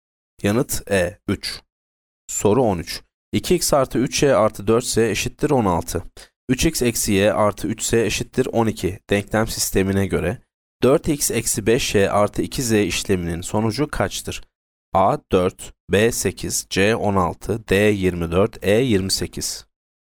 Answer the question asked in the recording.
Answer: Yanıt B 8.